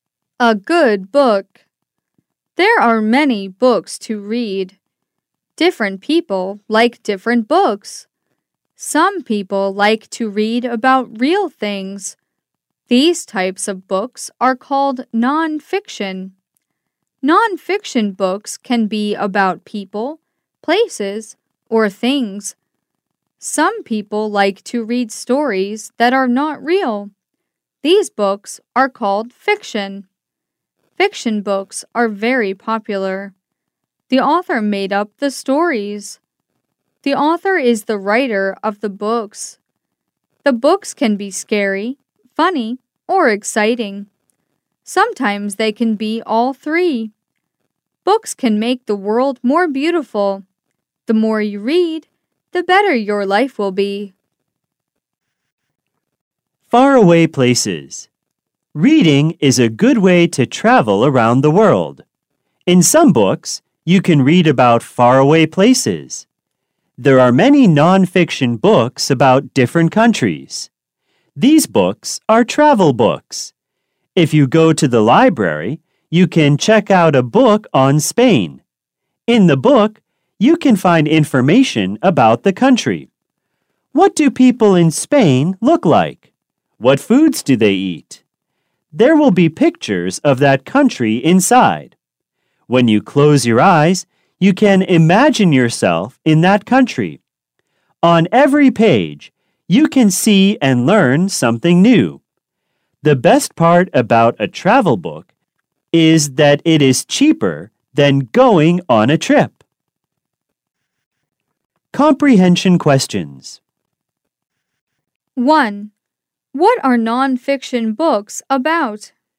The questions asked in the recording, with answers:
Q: What are nonfiction books about?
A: They are about people, places, or things.